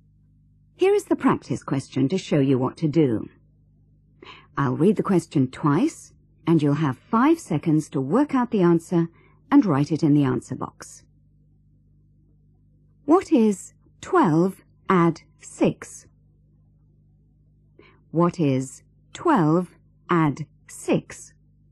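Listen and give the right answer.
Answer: 18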